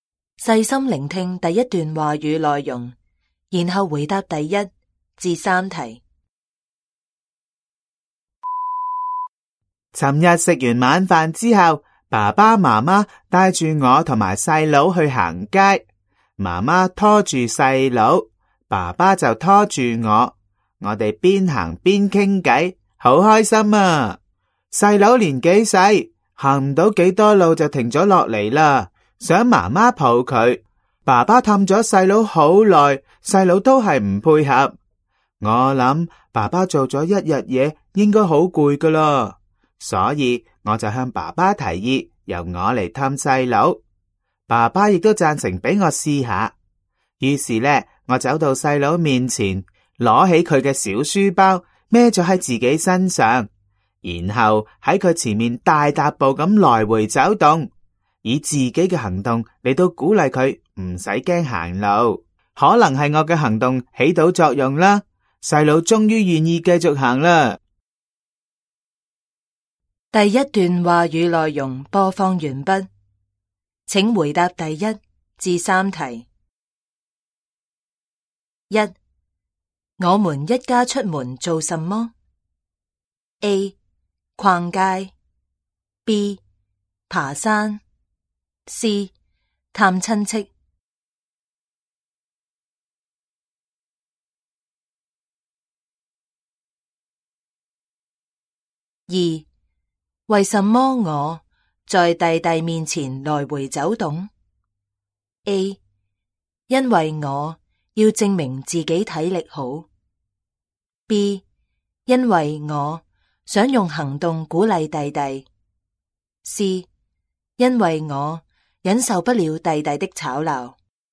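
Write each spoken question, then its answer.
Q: 我们一家出门做什么?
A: A: 逛街

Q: 为什么我在弟弟面前来回走动?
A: B: 因为我想用行动鼓励弟弟。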